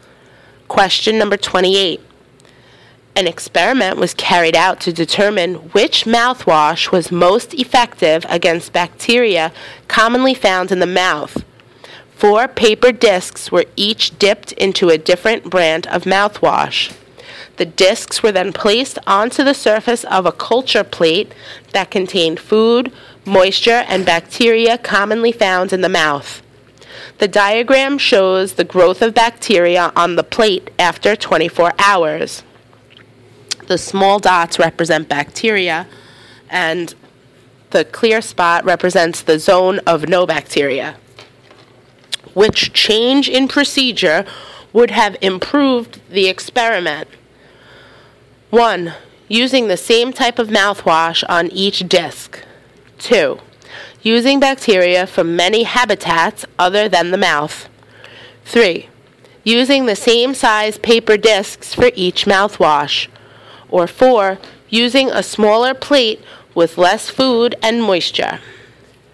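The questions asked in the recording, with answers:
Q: Which change in procedure would have improved the experiment?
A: 3: Using the same size paper discs for each mouthwash.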